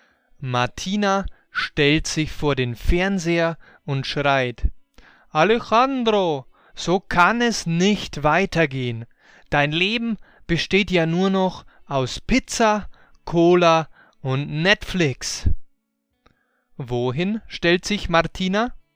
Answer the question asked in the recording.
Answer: Sie stellt sich vor den Fernseher.